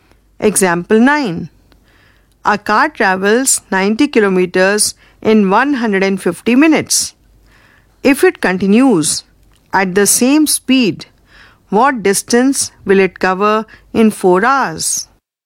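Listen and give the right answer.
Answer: 144 km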